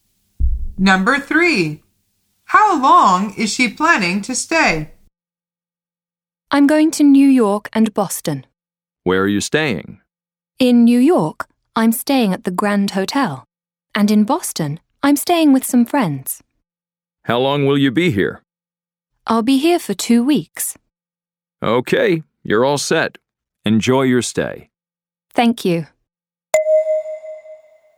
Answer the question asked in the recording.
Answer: The answer is 2 weeks.